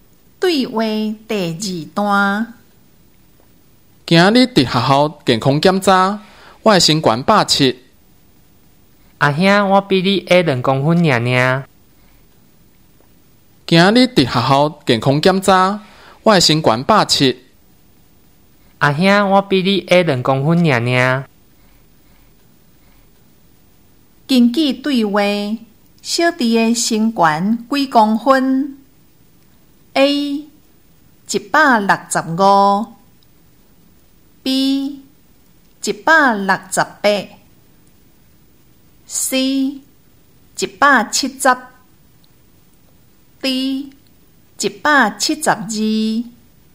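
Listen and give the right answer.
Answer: B: 168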